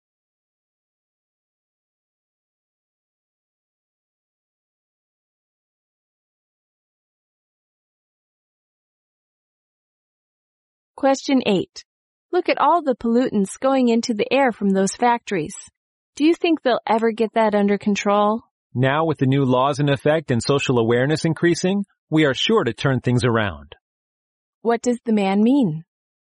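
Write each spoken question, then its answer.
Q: What does the man mean?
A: The pollution will be brought under control.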